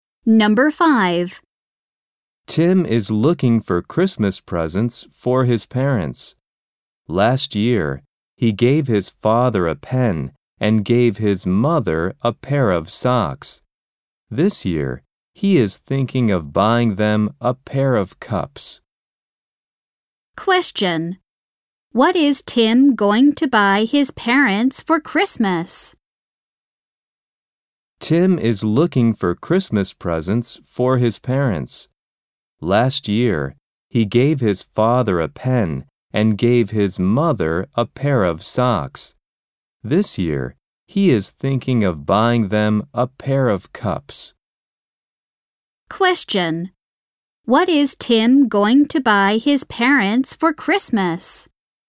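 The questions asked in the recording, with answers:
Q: What is Tim going to buy his parents for Christmas?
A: A pair of cups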